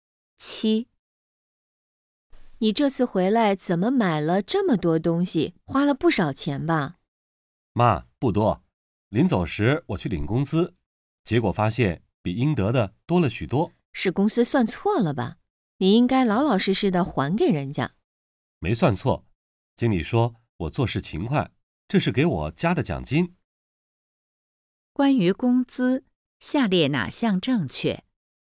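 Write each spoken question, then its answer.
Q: 关于工资,下列哪项正确?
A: 比应得的多,多出的是经理给加的奖金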